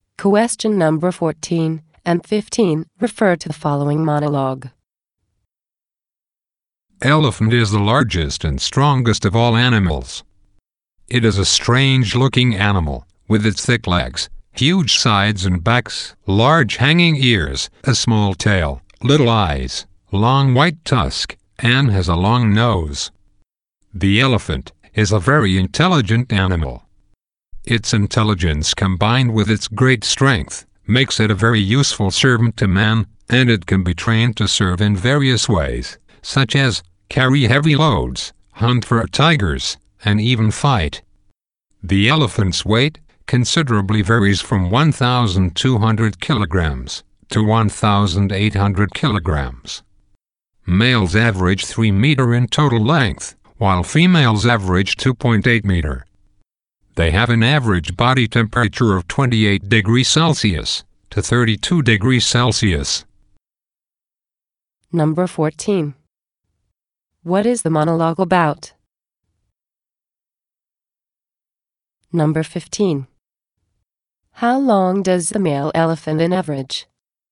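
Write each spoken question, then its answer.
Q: What is the monologue about?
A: Elephants

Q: How long does the male elephant on average?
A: 3 meters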